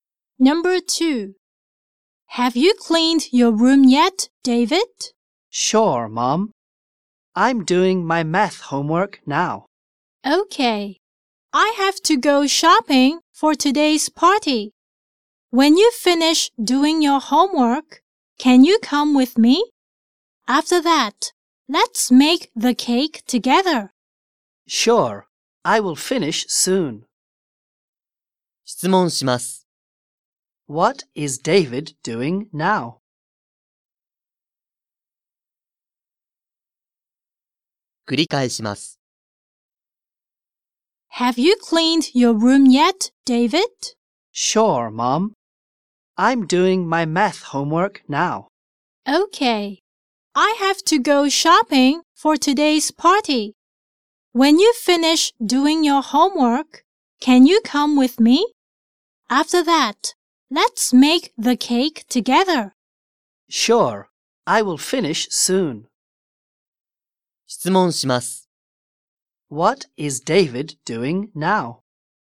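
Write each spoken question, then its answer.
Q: What is David doing now?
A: He is doing his math homework.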